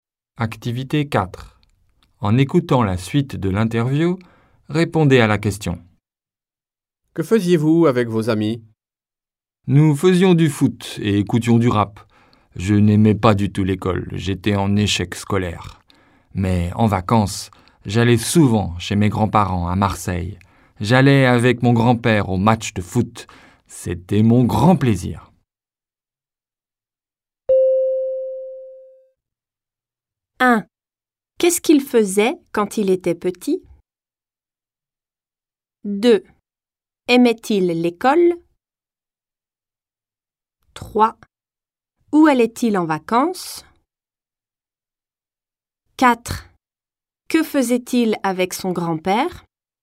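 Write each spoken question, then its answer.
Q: Qu'est-ce qu'il faisait quand il était petit?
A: Il faisait du foot et écoutait du rap avec ses amis.

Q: Aimait-il l'école?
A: Non, pas du tout ; il était en échec scolaire.

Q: Où allait-il en vacances?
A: Chez ses grands-parents à Marseille.

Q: Que faisait-il avec son grand-père?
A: Il allait au match de foot.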